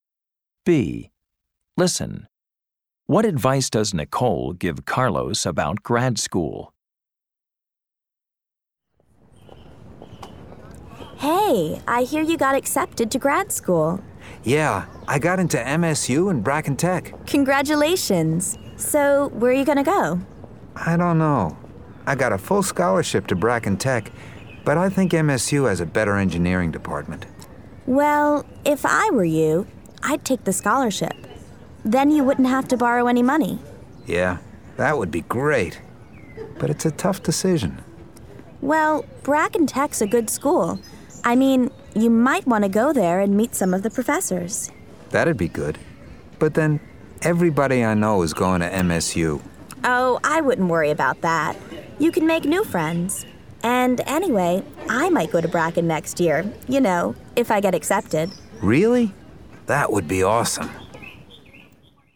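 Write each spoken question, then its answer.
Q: What advice does Nicole give Carlos about grad school?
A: Take the scholarship to Bracken Tech, visit and meet the professors, and don't worry about friends because he can make new ones.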